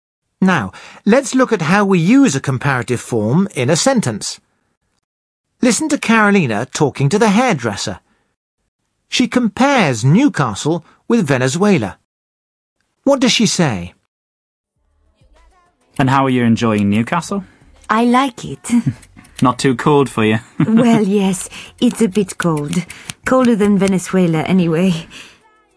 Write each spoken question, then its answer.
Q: What does she say?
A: She says that Newcastle is colder than Venezuela.